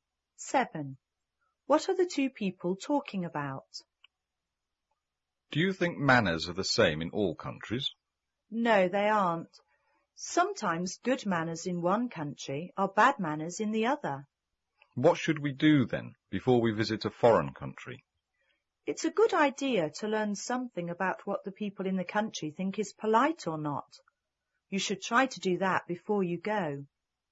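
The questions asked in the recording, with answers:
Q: What are the two people talking about?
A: Manners in different countries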